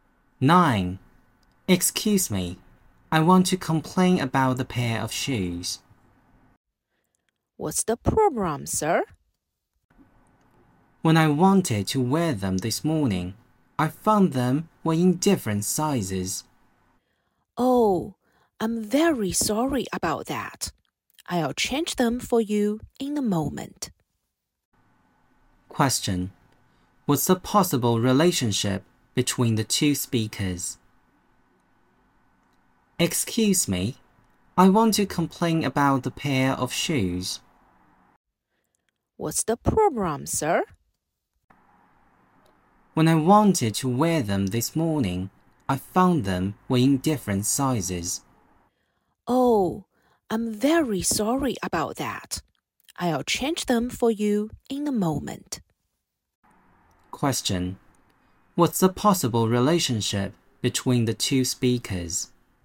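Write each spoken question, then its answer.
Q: What's the possible relationship between the two speakers?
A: Customer and shop assistant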